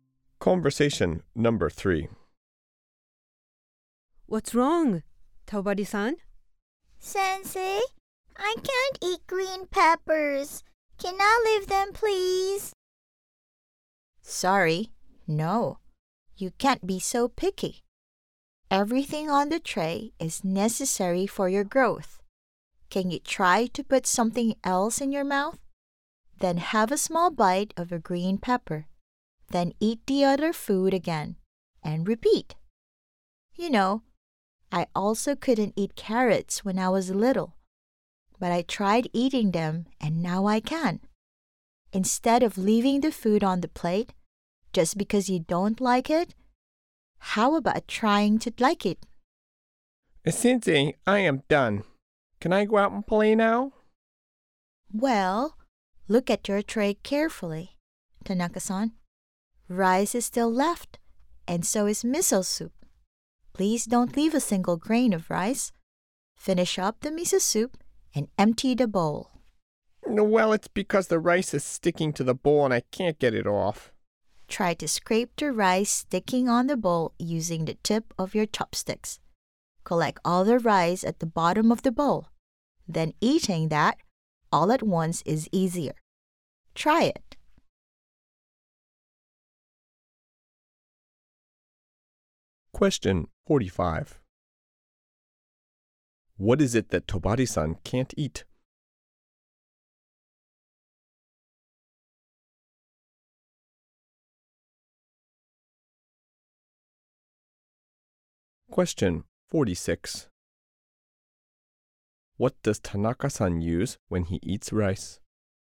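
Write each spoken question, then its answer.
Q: What is it that Tobari-san can't eat?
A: Green peppers

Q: What does Tanaka-san use when he eats rice?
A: Chopsticks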